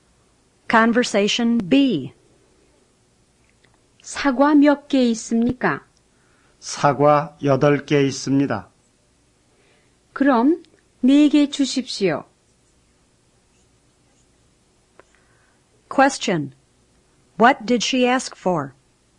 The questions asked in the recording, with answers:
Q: What did she ask for?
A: 4 apples.